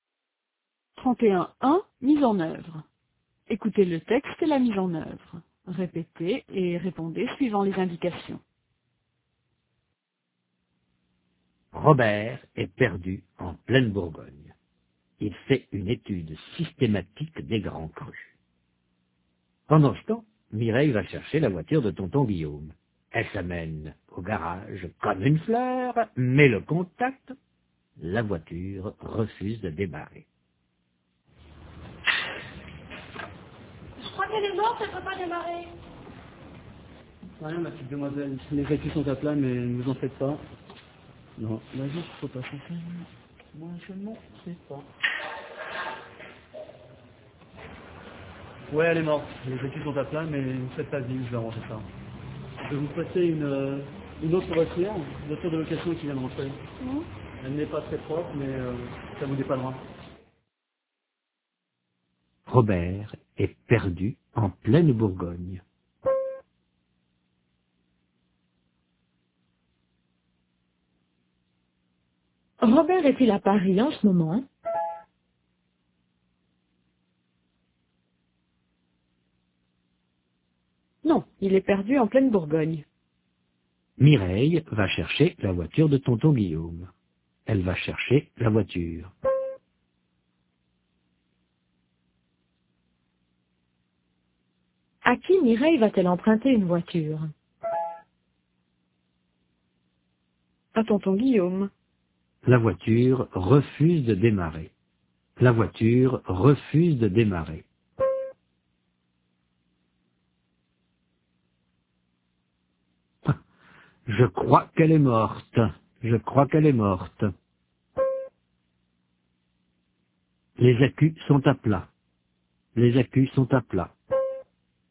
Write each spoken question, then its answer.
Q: Robert est-il à Paris en ce moment?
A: Non, il est perdu en pleine Bourgogne.

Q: À qui Mireille va-t-elle emprunter une voiture?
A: À tonton Guillaume.